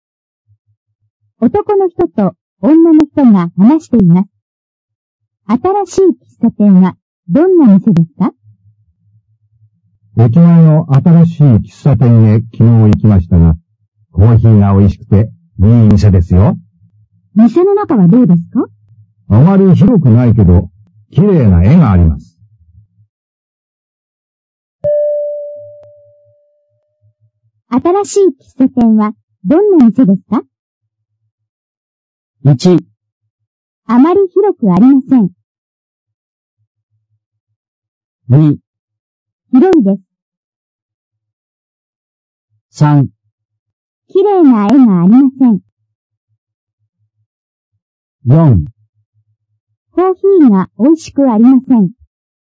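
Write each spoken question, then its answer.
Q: 新しい喫茶店はどんな店ですか?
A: 1: あまり広くありません。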